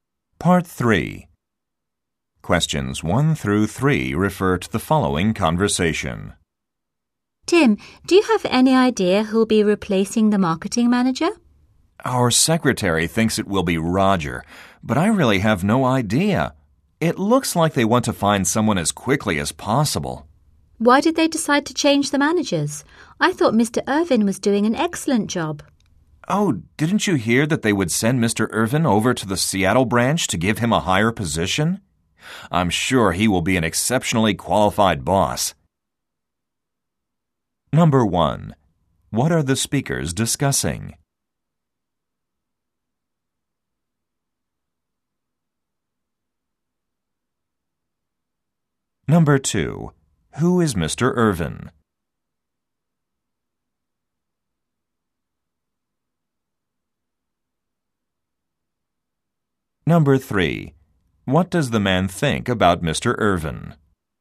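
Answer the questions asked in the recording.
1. Who will replace the marketing manager
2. The current marketing manager
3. He will be an exceptionally qualified boss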